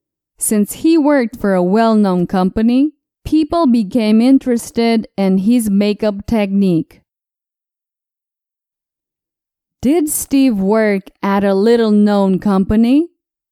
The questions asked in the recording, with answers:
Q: Did Steve work at a little-known company?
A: No. Steve worked at a well-known company.